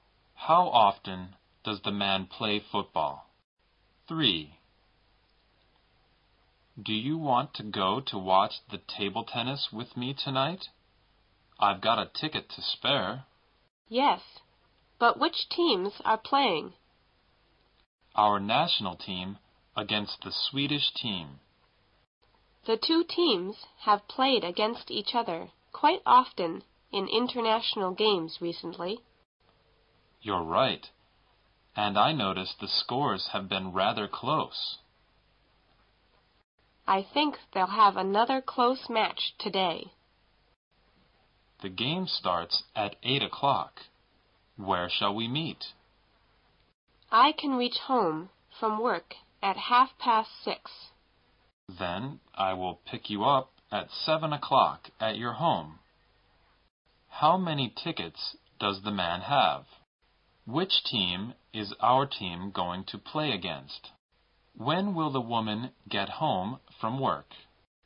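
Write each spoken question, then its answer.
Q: How many tickets does the man have?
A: Two

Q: Which team is our team going to play against?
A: The Swedish team

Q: When will the woman get home from work?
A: At 6:30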